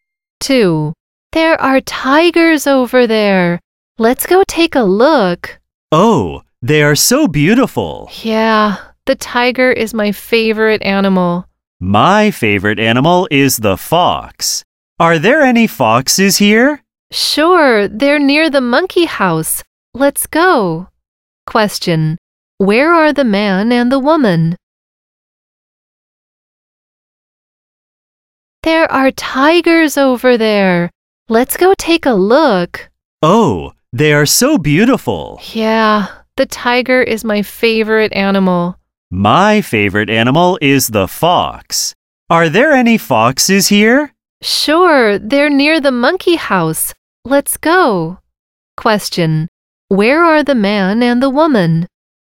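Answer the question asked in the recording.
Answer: At the zoo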